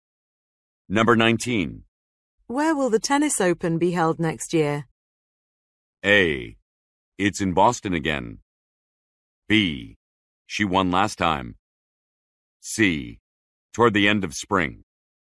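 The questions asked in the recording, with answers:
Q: Where will the tennis open be held next year?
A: A: It's in Boston again.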